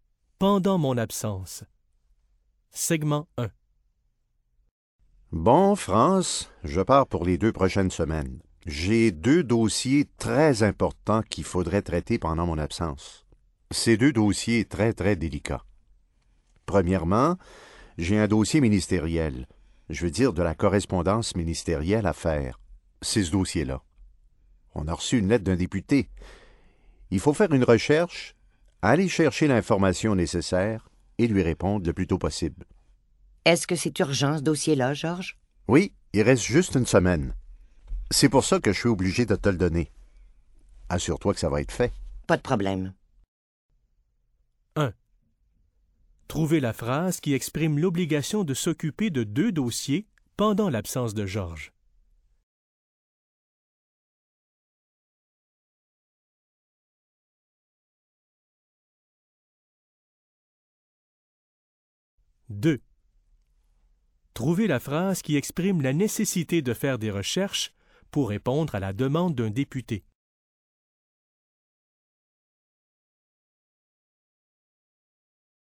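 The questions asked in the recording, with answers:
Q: Trouvez la phrase qui exprime l'obligation de s'occuper de deux dossiers pendant l'absence de Georges.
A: J'ai deux dossiers très importants qu'il faudrait traiter pendant mon absence.

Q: Trouvez la phrase qui exprime la nécessité de faire des recherches pour répondre à la demande d'un député.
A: Il faut faire une recherche, aller chercher l'information nécessaire et lui répondre le plus tôt possible.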